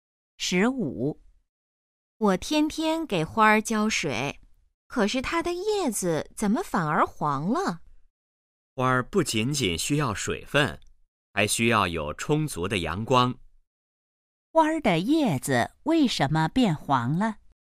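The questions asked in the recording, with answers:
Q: 花儿的叶子为什么变黄了?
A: 缺少阳光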